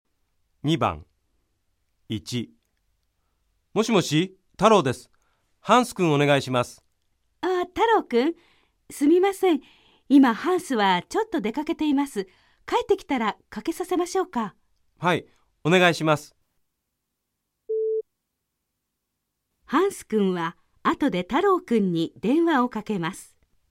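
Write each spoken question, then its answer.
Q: ハンス君は後で太郎君に電話をかけます。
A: ○(正しい)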